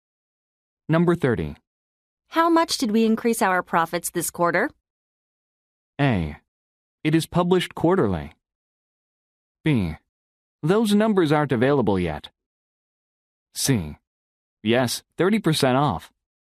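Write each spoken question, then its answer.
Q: How much did we increase our profits this quarter?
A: B: Those numbers aren't available yet.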